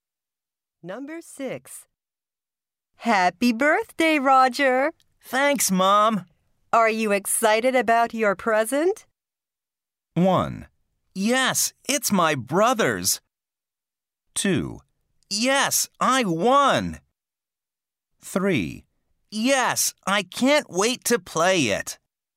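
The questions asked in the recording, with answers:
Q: Are you excited about your present?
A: 3: Yes, I can't wait to play it.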